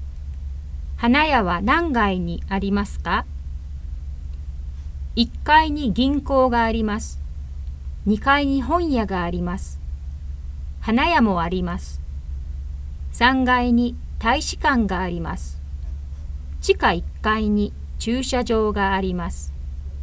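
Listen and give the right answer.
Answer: 2階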